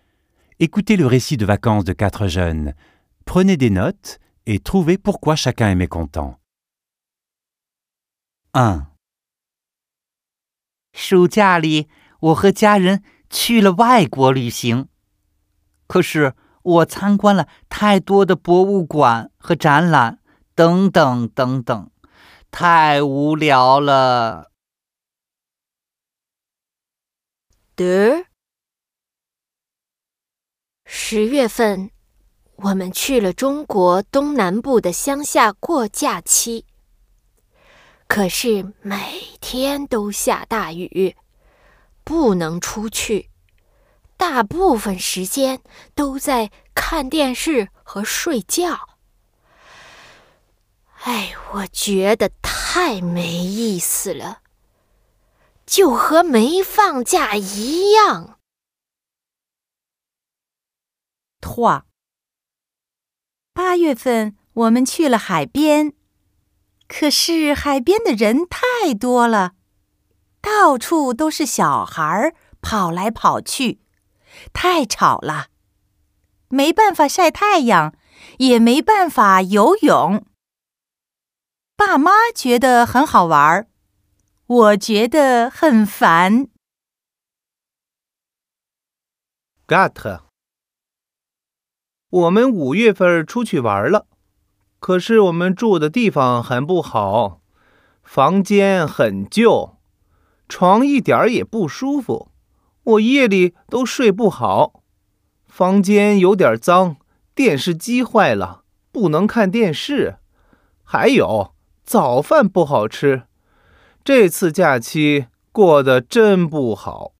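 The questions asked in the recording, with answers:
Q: Prenez des notes et trouvez pourquoi chacun est mécontent.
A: Trop de musées et d'expositions visités, c'était ennuyeux

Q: Prenez des notes et trouvez pourquoi chacun est mécontent.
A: Il a plu tous les jours, impossible de sortir

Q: Prenez des notes et trouvez pourquoi chacun est mécontent.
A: Trop de monde et d'enfants à la plage, trop bruyant, impossible de bronzer ou de nager

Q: Prenez des notes et trouvez pourquoi chacun est mécontent.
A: Le logement était mauvais : chambre vieille et sale, lit inconfortable, télé en panne, petit-déjeuner mauvais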